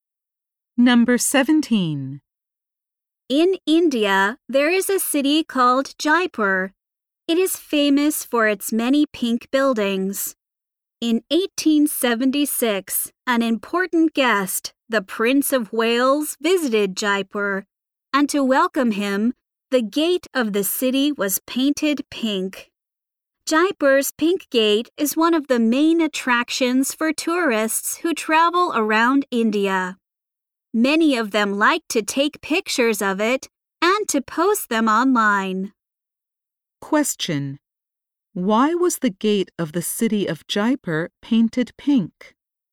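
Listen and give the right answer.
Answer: To welcome the Prince of Wales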